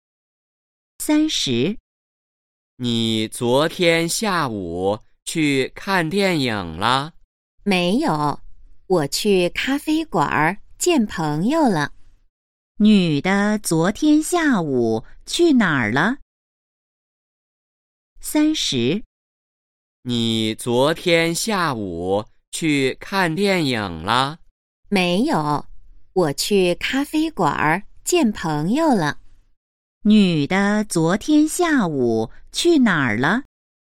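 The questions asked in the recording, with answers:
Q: 女的昨天下午去哪儿了?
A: 咖啡馆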